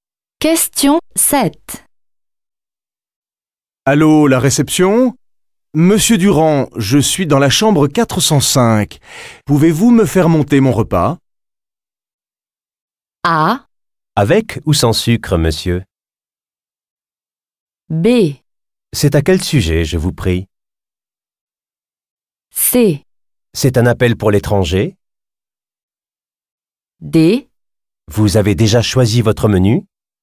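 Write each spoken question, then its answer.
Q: Pouvez-vous me faire monter mon repas ?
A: D: Vous avez déjà choisi votre menu ?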